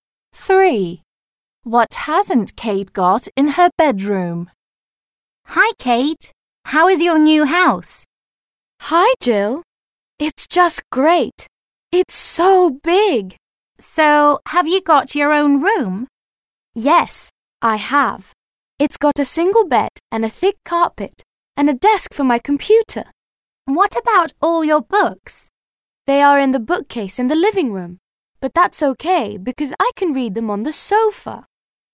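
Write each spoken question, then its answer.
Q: What hasn't Kate got in her bedroom?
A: A bookcase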